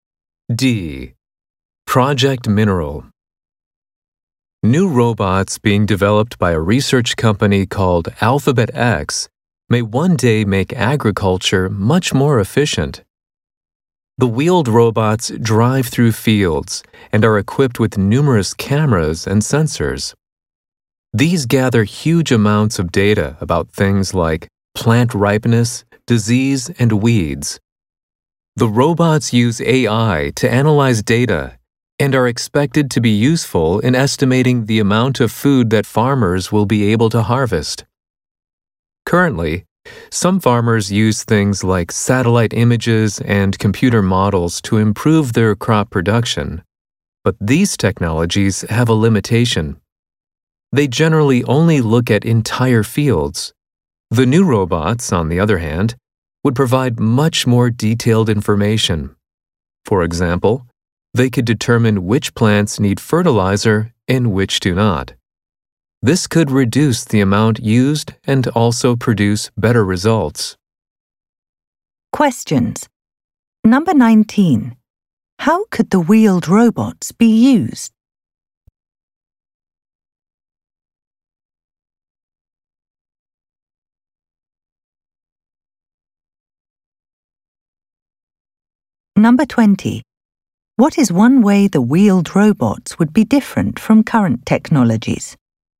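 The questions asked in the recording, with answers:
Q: How could the wheeled robots be used?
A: To estimate how much food farmers will be able to harvest

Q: What is one way the wheeled robots would be different from current technologies?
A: They would give much more detailed information, not just data on whole fields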